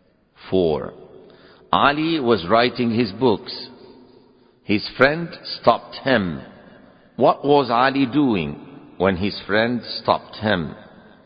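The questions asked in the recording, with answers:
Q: What was Ali doing when his friend stopped him?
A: He was writing his books.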